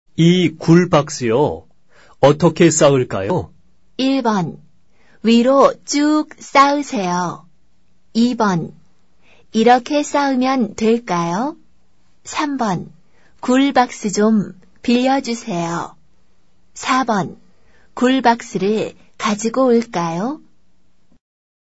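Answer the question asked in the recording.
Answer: 1: 위로 쭉 쌓으세요.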